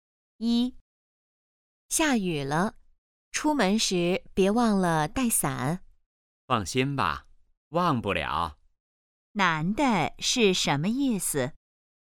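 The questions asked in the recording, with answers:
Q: 男的是什么意思?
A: 他不会忘记带伞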